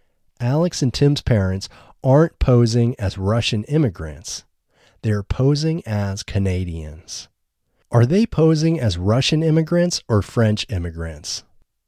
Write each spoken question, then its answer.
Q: Are they posing as Russian immigrants or French immigrants?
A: They aren't posing as Russian immigrants or French immigrants.